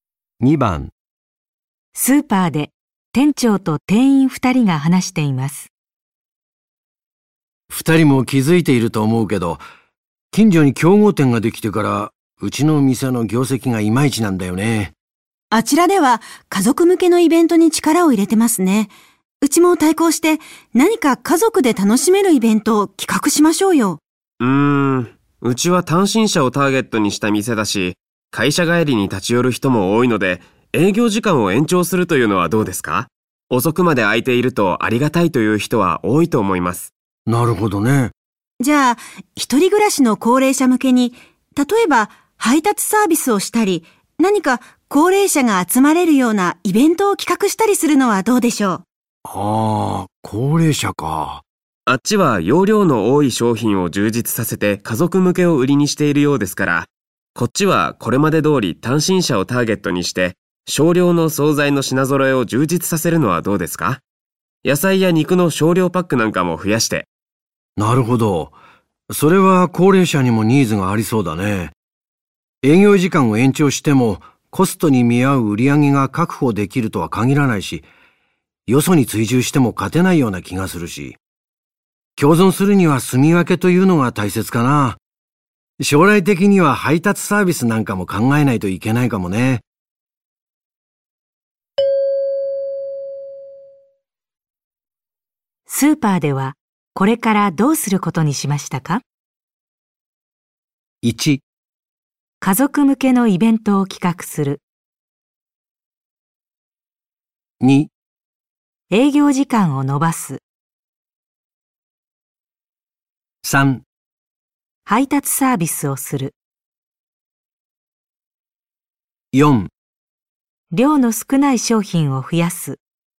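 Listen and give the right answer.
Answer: 4: 量の少ない商品を増やす。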